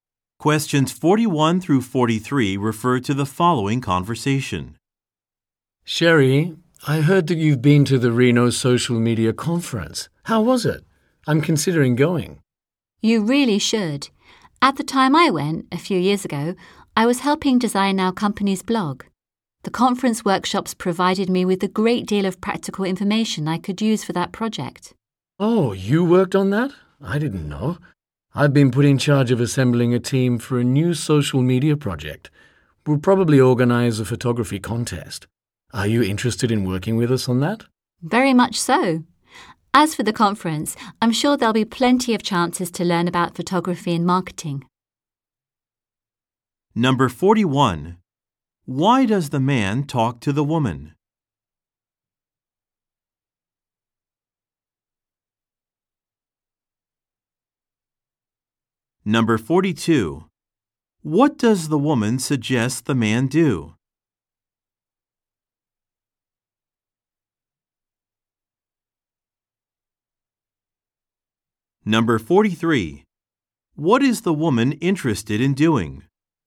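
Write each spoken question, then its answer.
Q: Why does the man talk to the woman?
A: To ask about the Reno Social Media Conference

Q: What does the woman suggest the man do?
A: Go to the conference

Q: What is the woman interested in doing?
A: Working on the new social media project team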